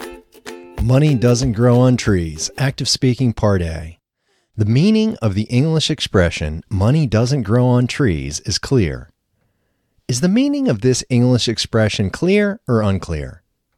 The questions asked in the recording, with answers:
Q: Is the meaning of this English expression clear or unclear?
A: The meaning of this English expression is clear.